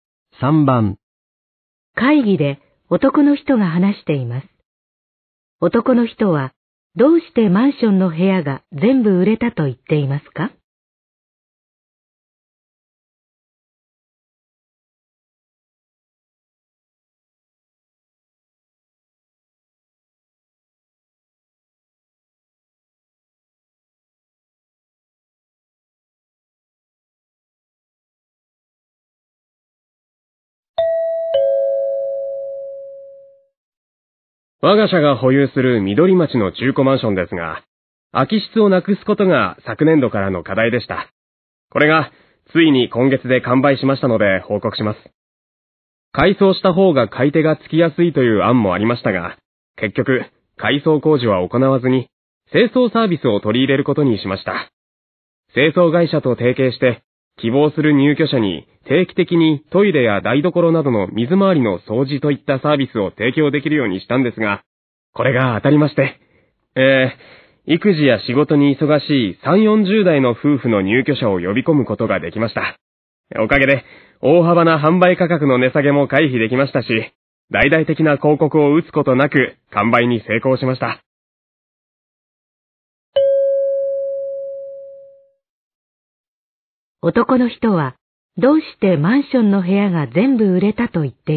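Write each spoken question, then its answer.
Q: 男の人は、どうしてマンションの部屋が全部売れたと言って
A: 清掃サービスを取り入れたから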